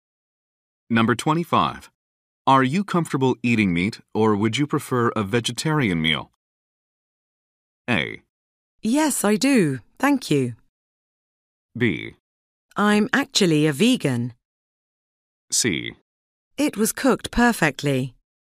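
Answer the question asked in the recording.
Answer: B: I'm actually a vegan.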